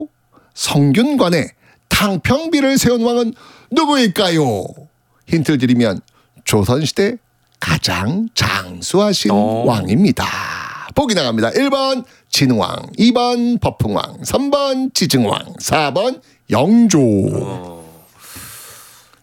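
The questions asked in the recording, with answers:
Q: 성균관에 탕평비를 세운 왕은 누구일까요?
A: 4번: 영조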